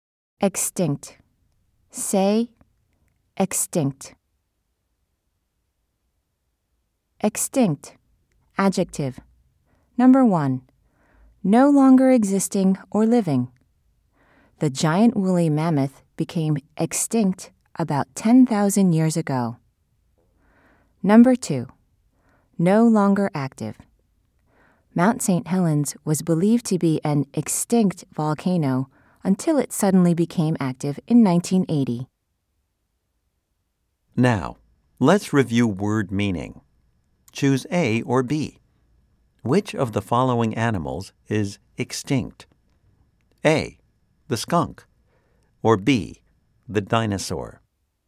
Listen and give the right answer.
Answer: If you said A, you are right.